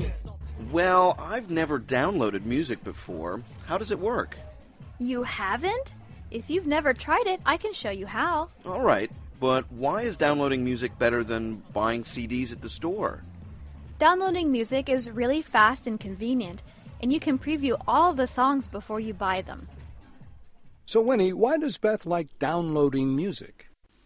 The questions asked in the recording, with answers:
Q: So Winnie, why does Beth like downloading music?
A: She says it's fast and convenient, and she can preview the songs before she buys them.